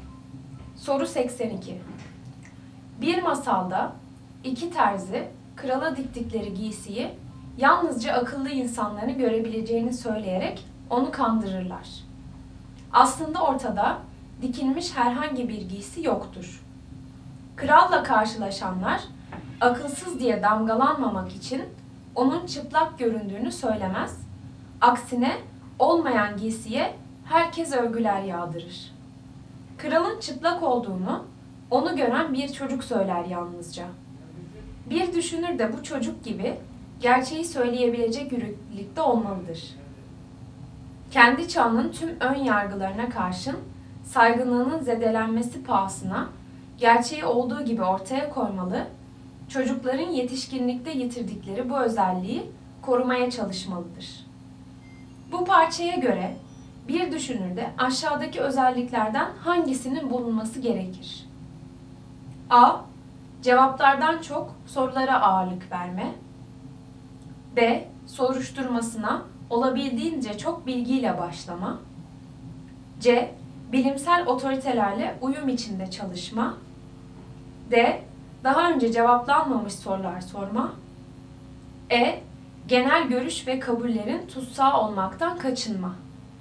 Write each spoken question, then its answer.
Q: Bu parçaya göre bir düşünürde aşağıdaki özelliklerden hangisinin bulunması gerekir?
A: Doğru cevap E. Genel görüş ve kabullerin tutsağı olmaktan kaçınma.